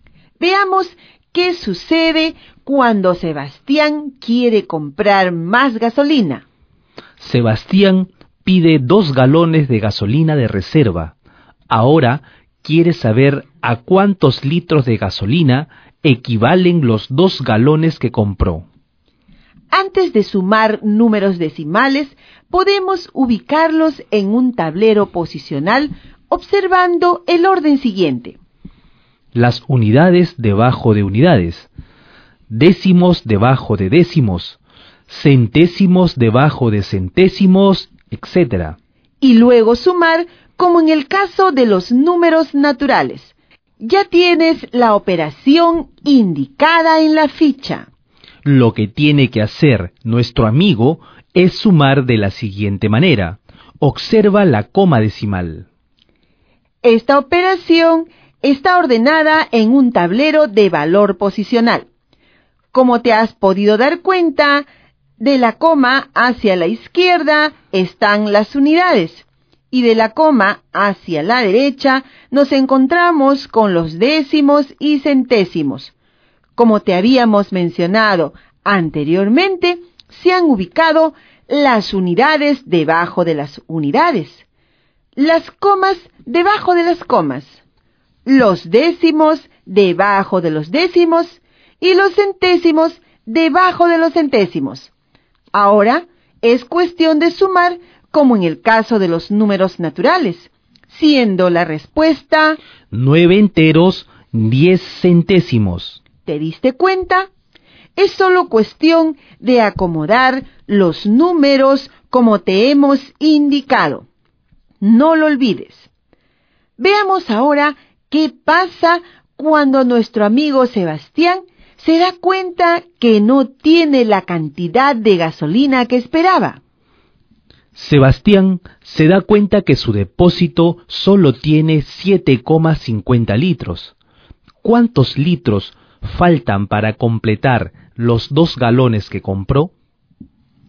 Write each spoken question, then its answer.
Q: ¿Cuántos litros faltan para completar los 2 galones que compró?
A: 1 entero, 60 centésimos.